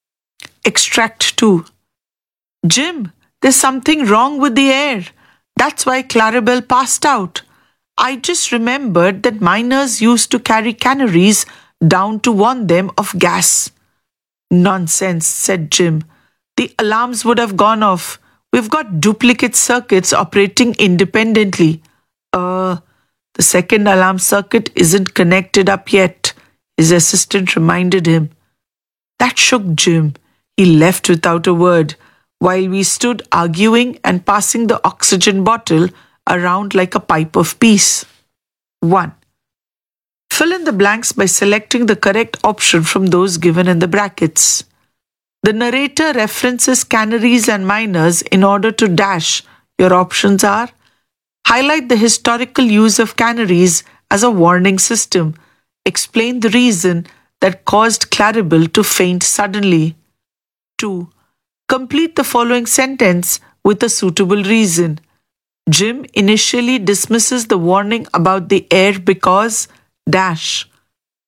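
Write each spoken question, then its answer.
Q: Jim initially dismisses the warning about the air because... dash.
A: he believed the alarms would have gone off, since there were duplicate circuits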